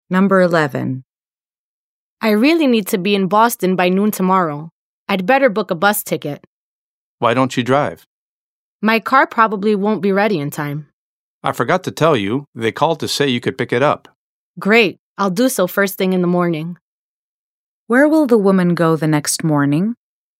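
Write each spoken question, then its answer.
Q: Where will the woman go the next morning?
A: To the garage to pick up her car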